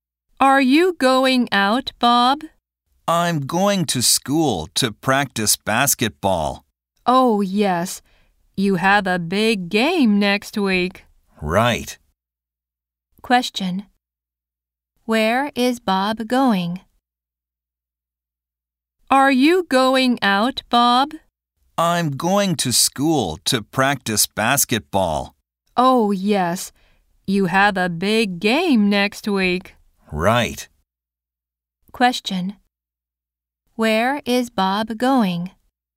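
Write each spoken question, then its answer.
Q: Where is Bob going?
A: To school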